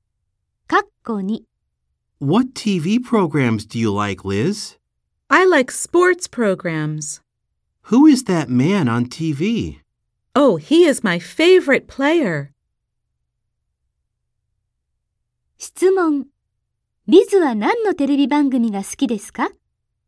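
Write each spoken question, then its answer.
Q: Liz は何のテレビ番組が好きですか?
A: スポーツ番組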